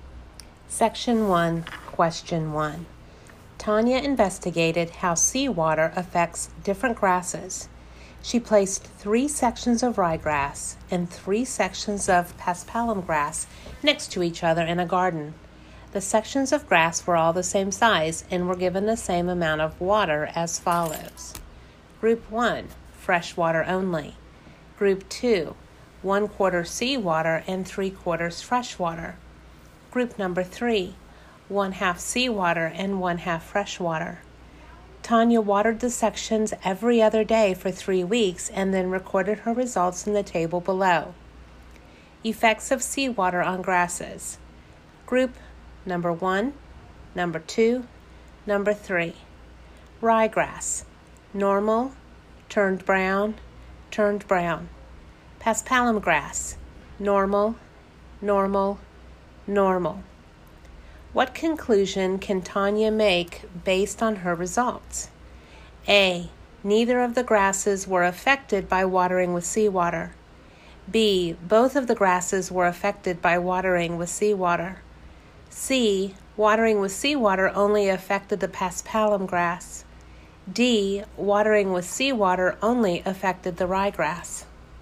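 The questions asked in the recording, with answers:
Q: What conclusion can Tanya make based on her results?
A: D: watering with seawater only affected the ryegrass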